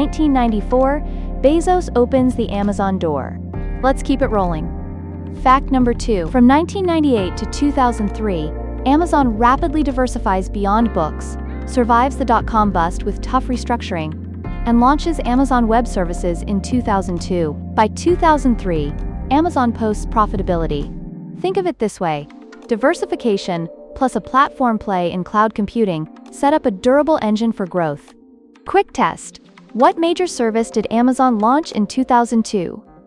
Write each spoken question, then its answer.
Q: What major service did Amazon launch in 2002?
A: Correct answer. Amazon Web Services, AWS.